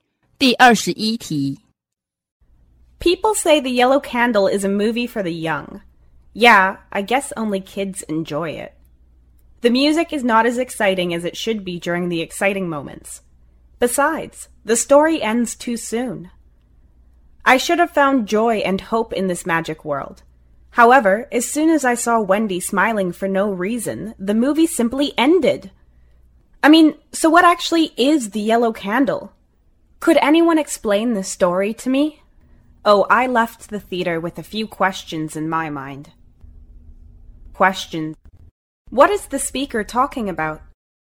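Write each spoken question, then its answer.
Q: What is the speaker talking about?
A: The movie The Yellow Candle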